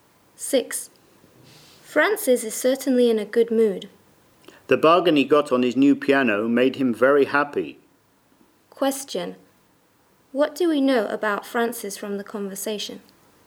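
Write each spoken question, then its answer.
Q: What do we know about Francis from the conversation?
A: He got his new piano at a bargain price and is happy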